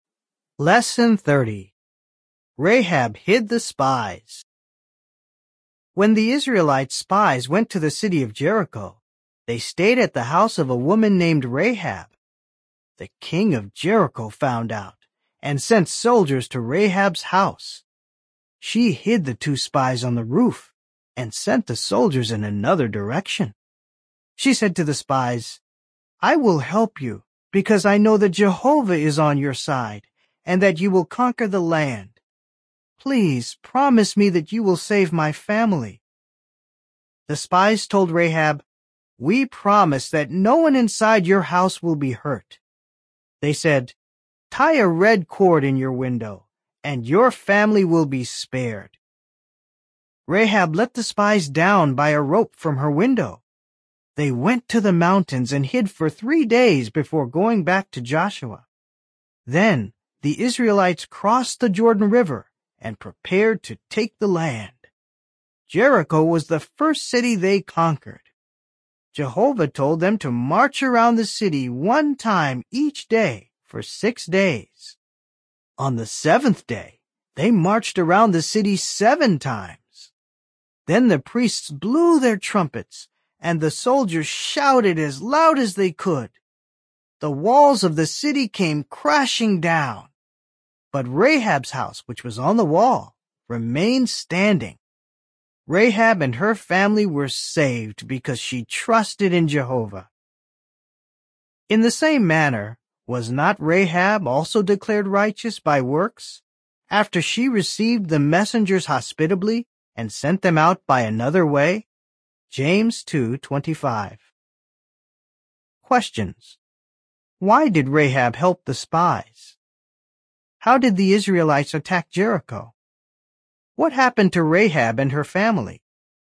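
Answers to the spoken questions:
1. Because she knew Jehovah was on the Israelites' side and they would conquer the land
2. They marched around the city once a day for 6 days, 7 times on the seventh day, then the priests blew trumpets and the soldiers shouted, and the walls fell
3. They were saved; her house stayed standing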